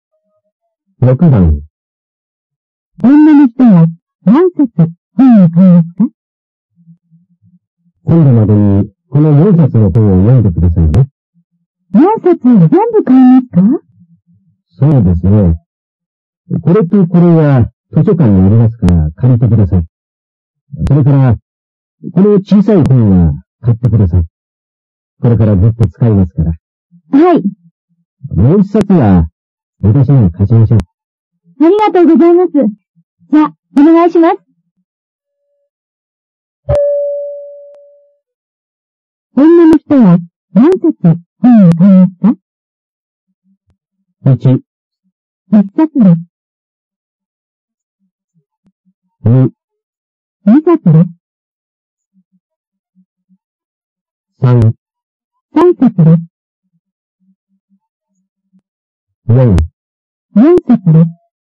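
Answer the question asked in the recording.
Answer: 1: 1冊です。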